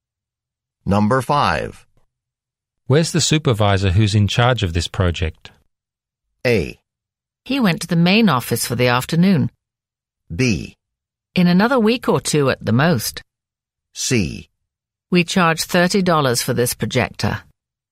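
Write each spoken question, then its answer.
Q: Where's the supervisor who's in charge of this project?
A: A: He went to the main office for the afternoon.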